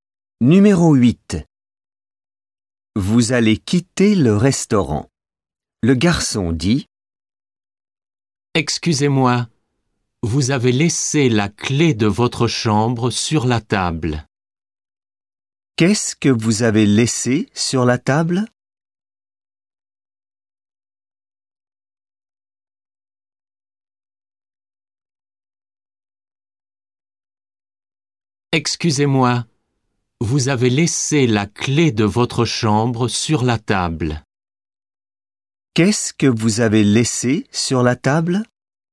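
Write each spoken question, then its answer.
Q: Qu'est-ce que vous avez laissé sur la table?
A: La clé de votre chambre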